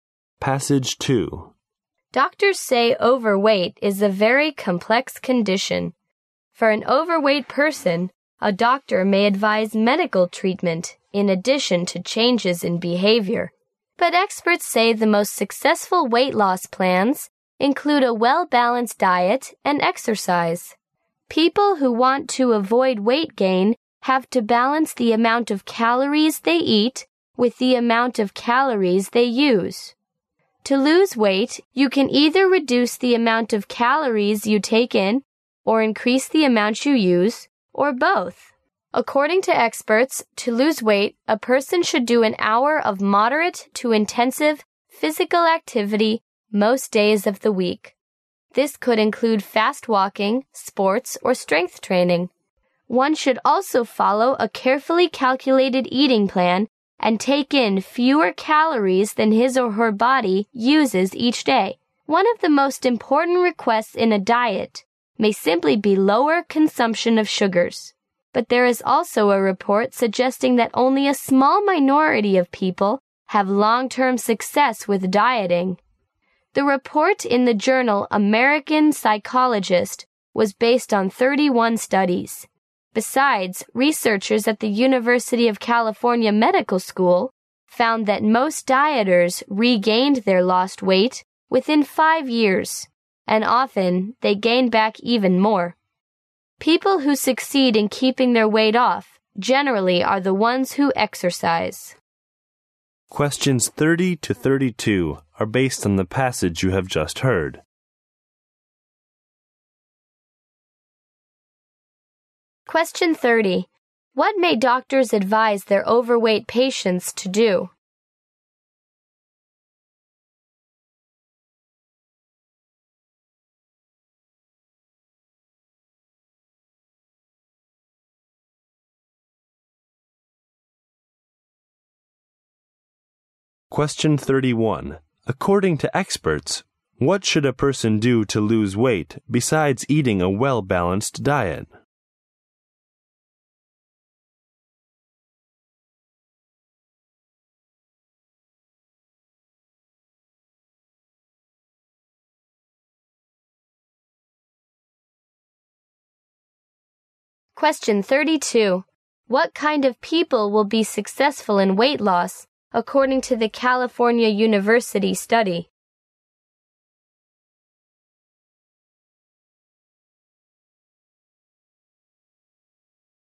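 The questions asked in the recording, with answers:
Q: What may doctors advise their overweight patients to do?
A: Get medical treatment and change their behavior

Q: According to experts, what should a person do to lose weight besides eating a well-balanced diet?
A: Do an hour of moderate to intensive physical activity most days

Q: What kind of people will be successful in weight loss?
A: People who exercise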